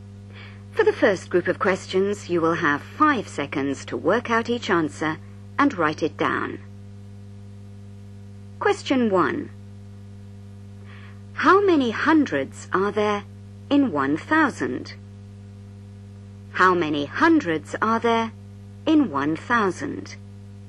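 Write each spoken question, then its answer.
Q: How many hundreds are there in 1,000?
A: 10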